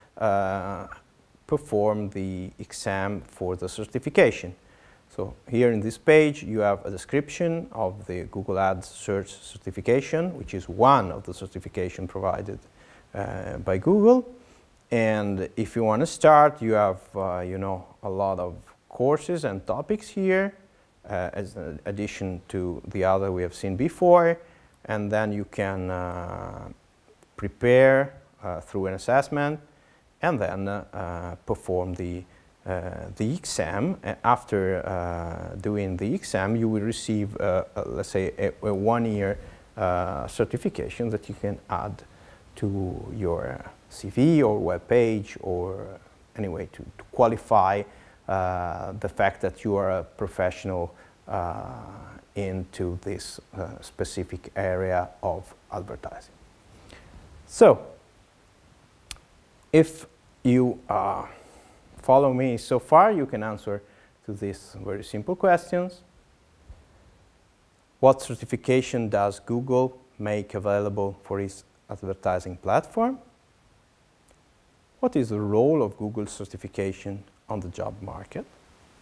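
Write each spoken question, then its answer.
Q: What certification does Google make available for its advertising platform?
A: The Google Ads Search certification

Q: What is the role of Google certification on the job market?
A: It is a 1-year certification that you can add to your CV or web page to show you are a professional in this area of advertising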